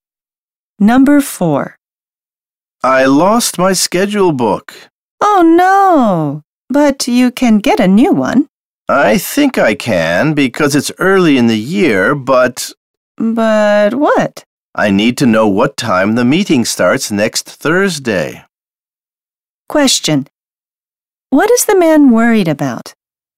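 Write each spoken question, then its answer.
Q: What is the man worried about?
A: He needs to know what time the meeting starts next Thursday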